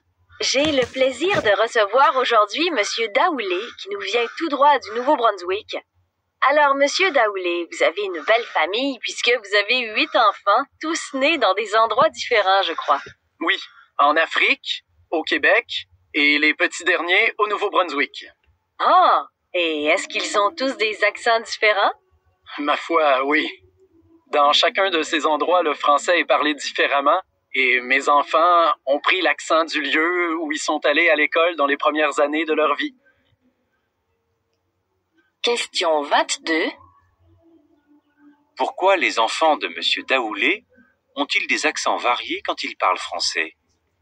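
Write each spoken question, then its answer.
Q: Pourquoi les enfants de M. Daoulé ont-ils des accents variés quand ils parlent français?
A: Ils ont pris l'accent du lieu où ils sont allés à l'école dans leurs premières années.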